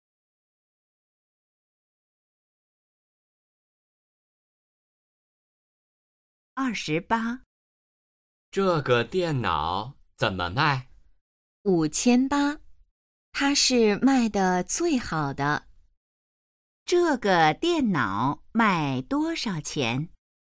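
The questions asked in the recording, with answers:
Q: 这个电脑卖多少钱?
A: 5800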